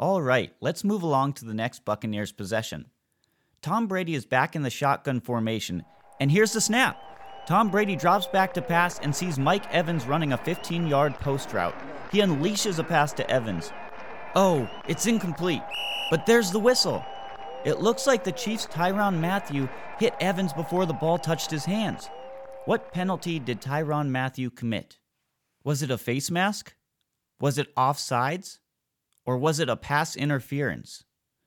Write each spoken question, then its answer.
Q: What penalty did Tyrann Mathieu commit?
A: If you said pass interference, you are right.